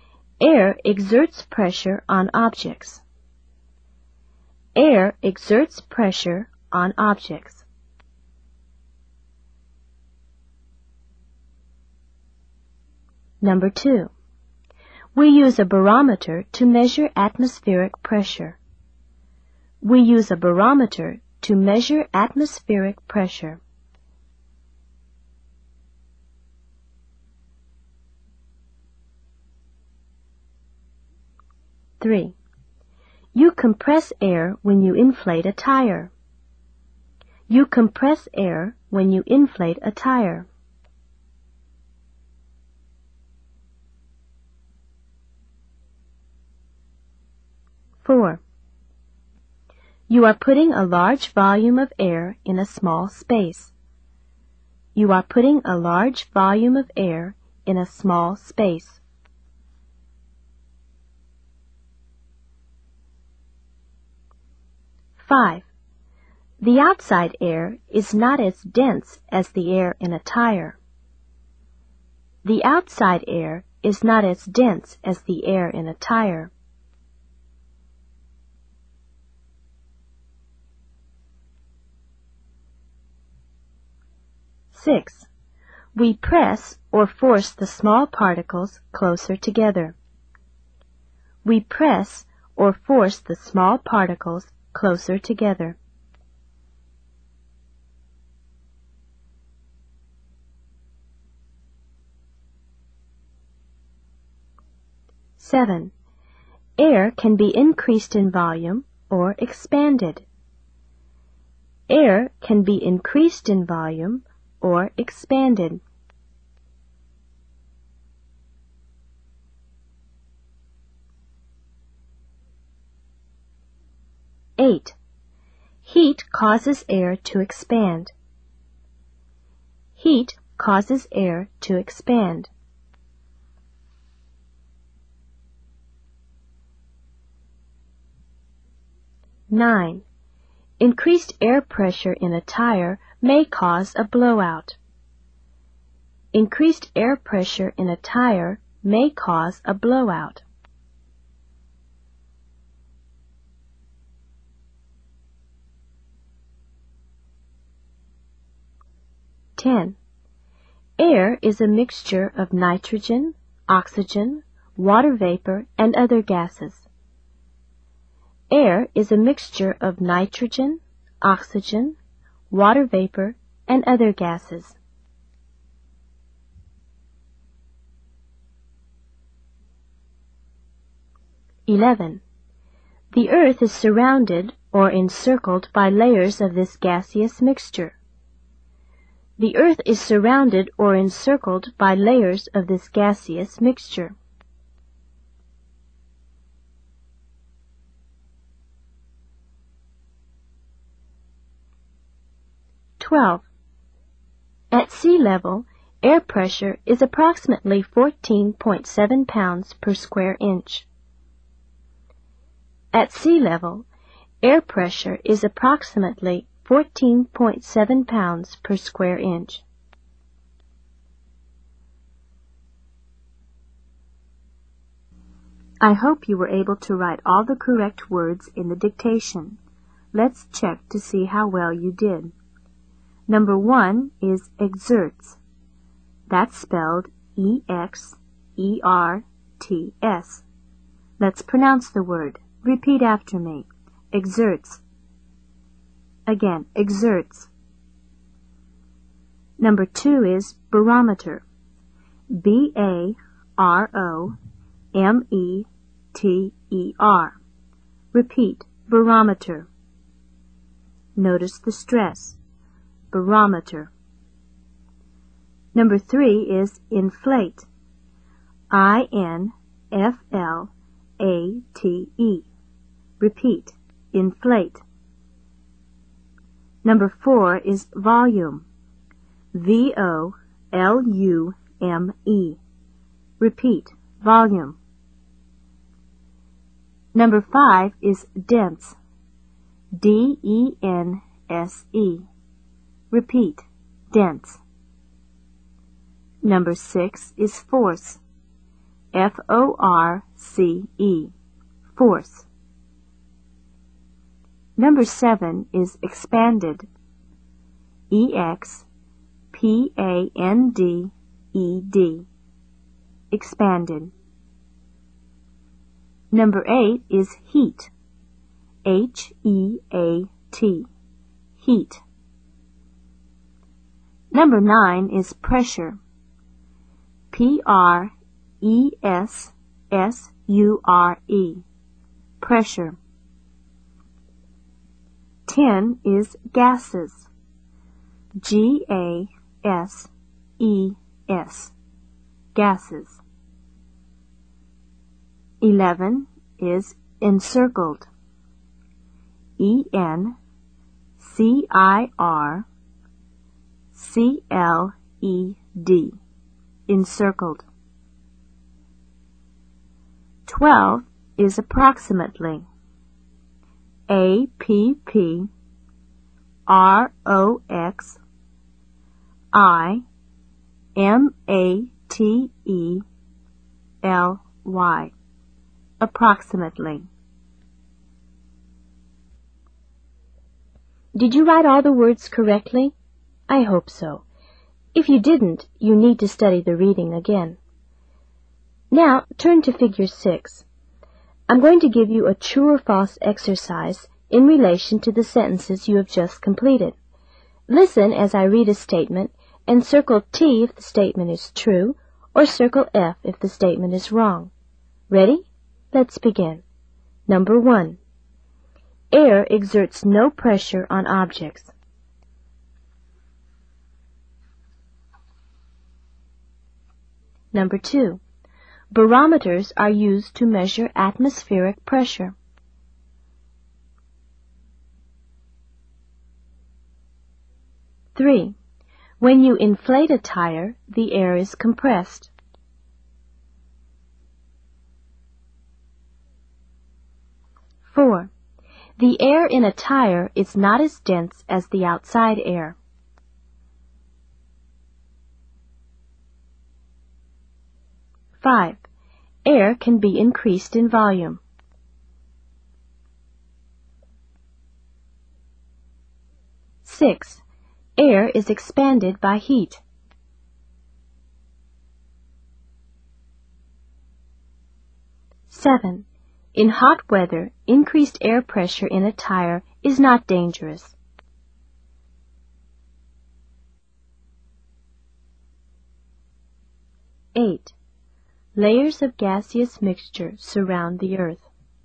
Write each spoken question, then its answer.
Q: Air exerts no pressure on objects.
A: Number 1 is false.

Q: Barometers are used to measure atmospheric pressure.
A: 2 is true.

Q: when you inflate a tire, the air is compressed.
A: 3 is true.

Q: the air in a tire is not as dense as the outside air.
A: 4 is false.

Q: air can be increased in volume.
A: 5 is true.

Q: air is expanded by heat.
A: 6 is true.

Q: In hot weather, increased air pressure in a tire is not dangerous.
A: 7 is false.

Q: Layers of gaseous mixture surround the earth.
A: 8 is true.